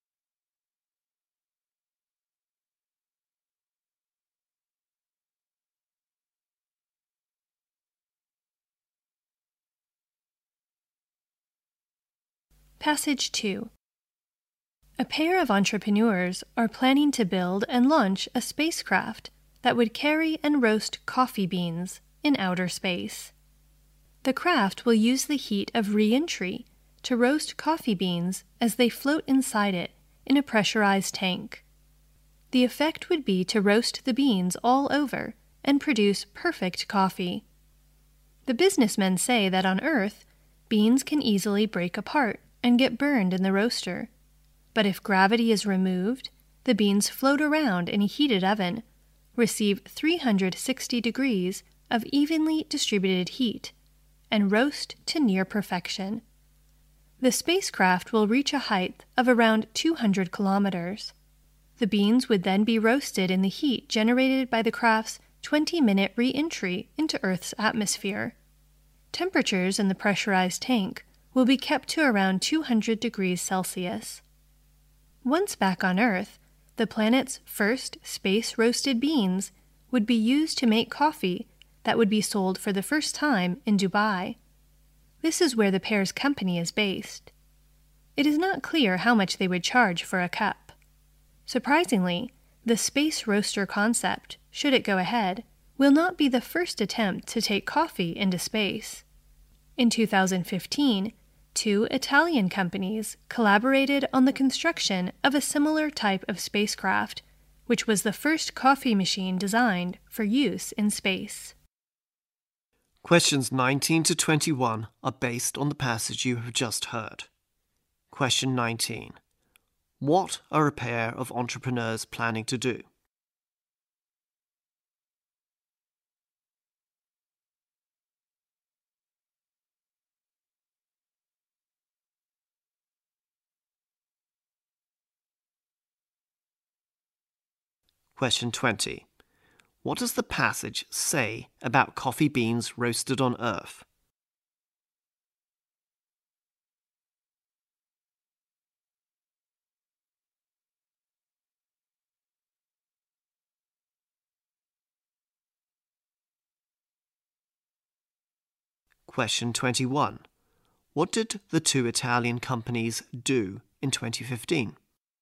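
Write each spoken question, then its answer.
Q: What are a pair of entrepreneurs planning to do?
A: Build and launch a spacecraft to roast coffee beans in space

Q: What does the passage say about coffee beans roasted on Earth?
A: They can easily break apart and get burned

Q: What did the two Italian companies do in 2015?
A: Built the first coffee machine designed for use in space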